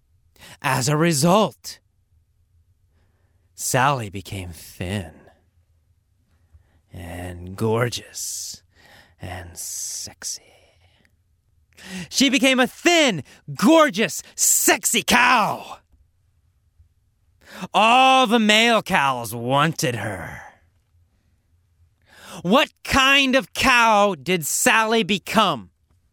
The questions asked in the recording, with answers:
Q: What kind of cow did Sally become?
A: She became a thin, gorgeous, sexy cow.